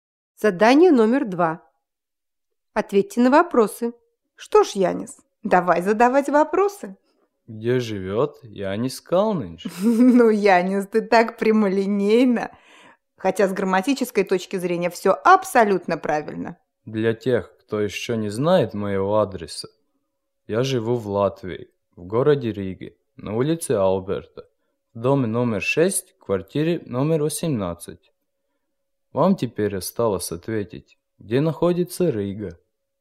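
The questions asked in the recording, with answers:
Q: Вам теперь осталось ответить, где находится Рига?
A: В Латвии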